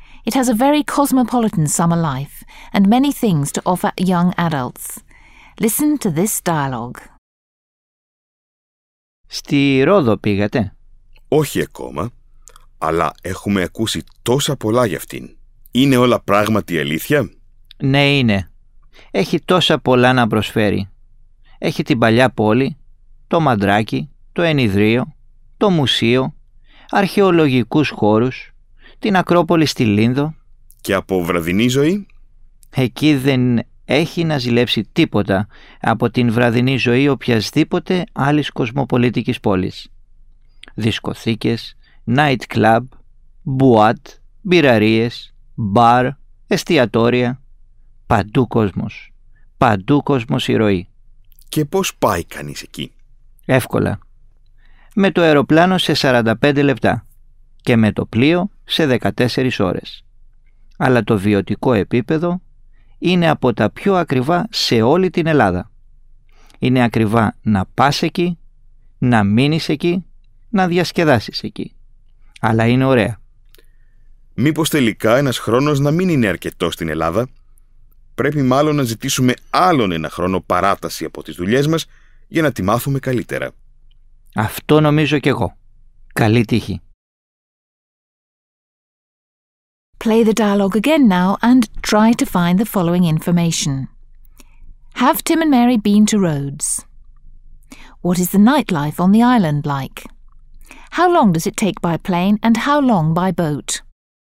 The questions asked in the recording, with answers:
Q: Have Tim and Mary been to Rhodes?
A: Tim and Mary have not been to Rhodes yet.

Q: What is the nightlife on the island like?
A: It's a very cosmopolitan city with a lively nightlife.

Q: How long does it take by plane and how long by boat?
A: And it takes 45 minutes to get there by plane and 14 hours to get there by boat.